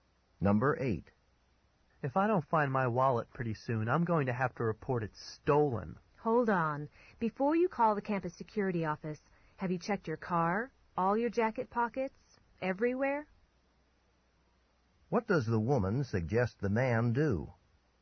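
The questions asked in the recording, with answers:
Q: What does the woman suggest the man do?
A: Look everywhere for the wallet, including his car and jacket pockets, before reporting it stolen.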